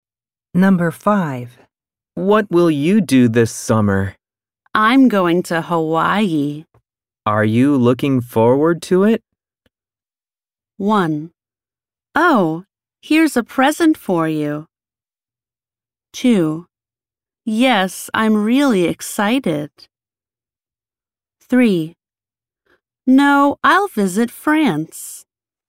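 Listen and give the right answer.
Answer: 2: Yes, I'm really excited.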